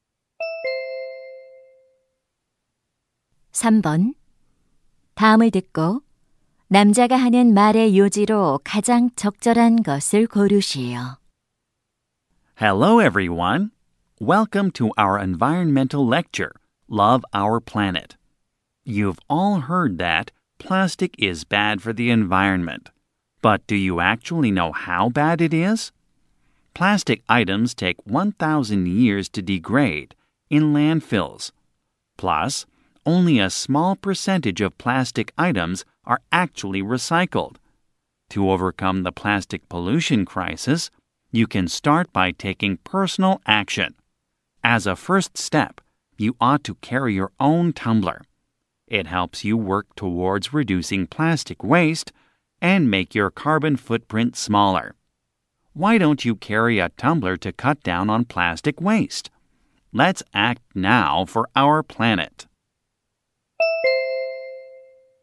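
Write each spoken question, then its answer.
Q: 다음을 듣고 남자가 하는 말의 요지로 가장 적절한 것을 고르시오.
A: 플라스틱 쓰레기를 줄이기 위해 개인 텀블러를 가지고 다녀야 한다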